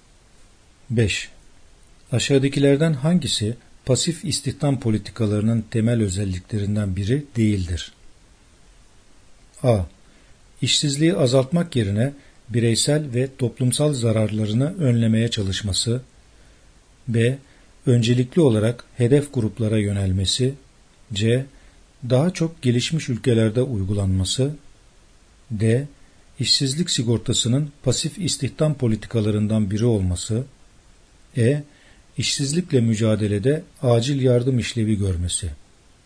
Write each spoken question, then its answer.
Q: Aşağıdakilerden hangisi pasif istihdam politikalarının temel özelliklerinden biri değildir?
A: Yanıt B. Öncelikli olarak hedef gruplara yönelmesi.